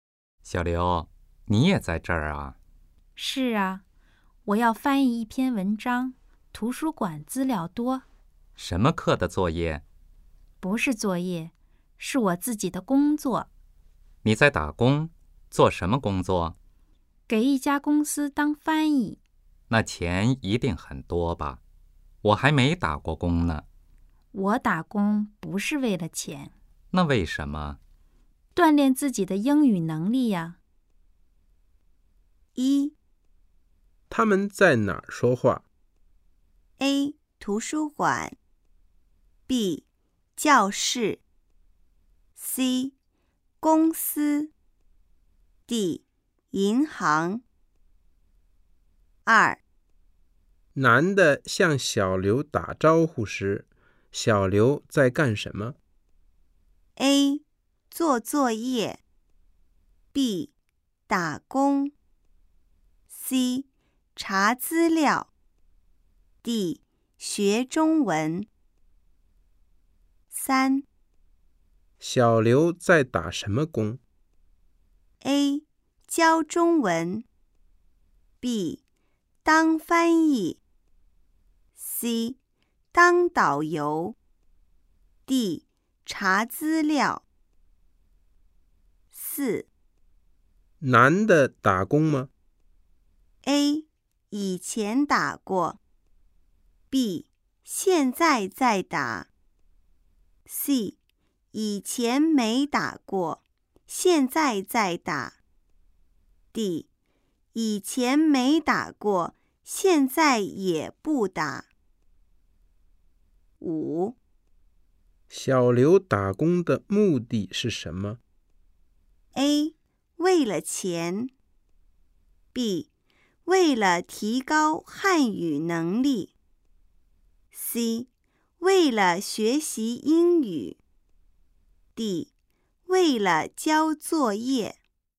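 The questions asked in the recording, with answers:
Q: 他们在哪儿说话?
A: A: 图书馆

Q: 小刘在打什么工?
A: B: 当翻译

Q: 男的打工吗?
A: D: 以前没打过,现在也不打

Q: 小刘打工的目的是什么?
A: C: 为了学习英语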